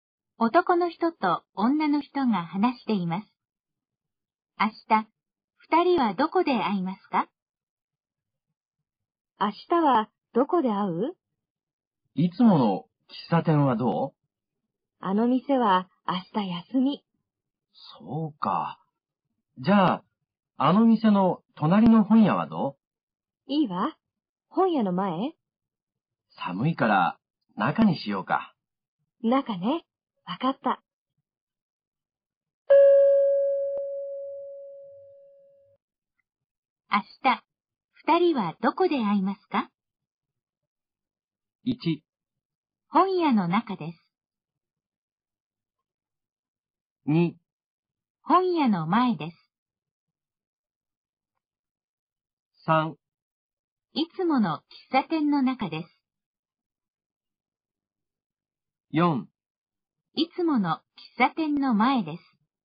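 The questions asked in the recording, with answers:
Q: 明日、二人はどこで会いますか?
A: 1: 本屋の中です。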